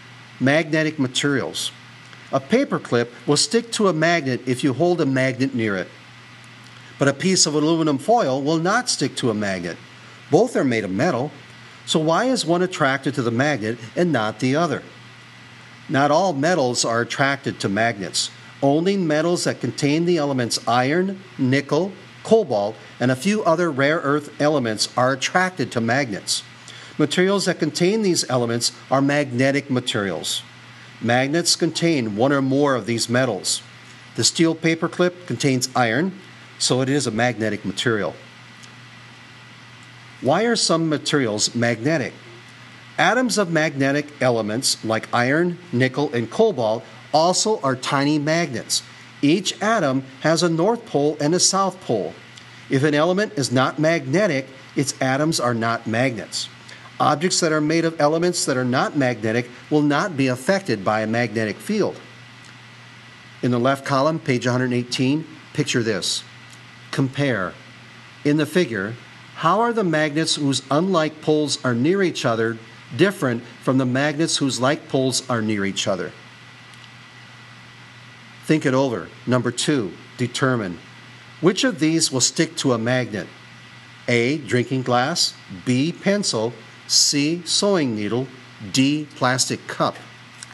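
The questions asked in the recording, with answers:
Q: Which of these will stick to a magnet?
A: C: sewing needle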